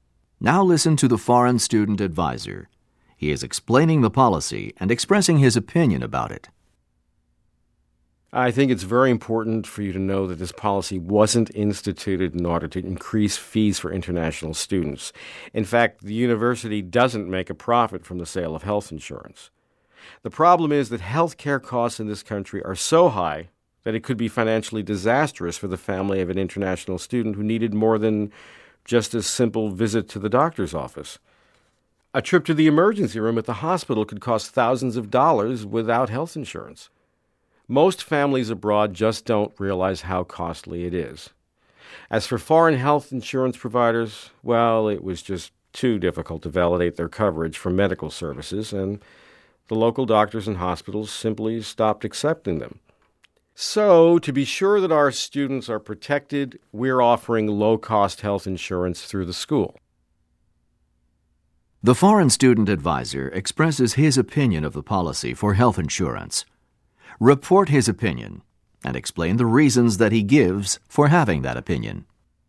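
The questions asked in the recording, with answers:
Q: The foreign student advisor expresses his opinion of the policy for health insurance. Report his opinion and explain the reasons that he gives for having that opinion.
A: He supports the policy: it wasn't made for profit; health care here is so expensive (an emergency room visit can cost thousands) that it could ruin a student's family; and foreign insurers' coverage was too hard to verify, so local providers stopped accepting them.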